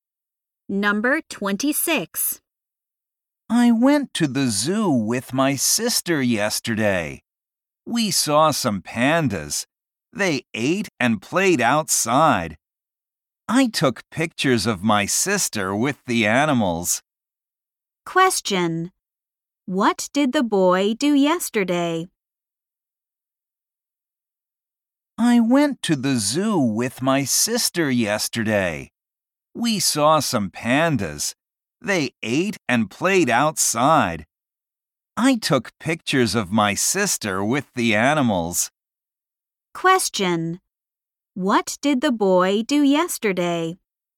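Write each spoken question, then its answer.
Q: What did the boy do yesterday?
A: He went to the zoo with his sister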